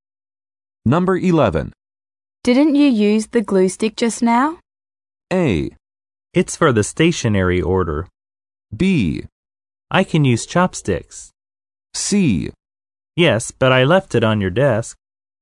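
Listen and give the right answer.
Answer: C: Yes, but I left it on your desk.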